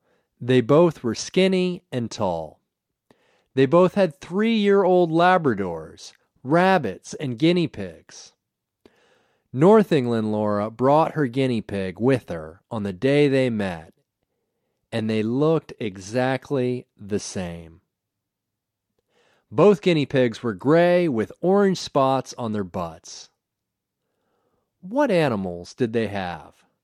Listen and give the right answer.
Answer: They both had rabbits, Labradors, and guinea pigs.